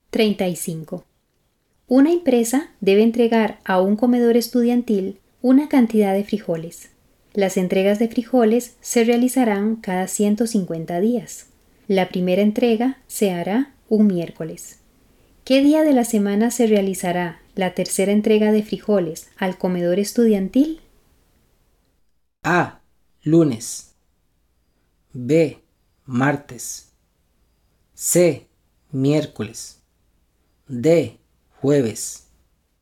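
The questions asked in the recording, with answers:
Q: ¿Qué día de la semana se realizará la tercera entrega de frijoles al comedor estudiantil?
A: B: Martes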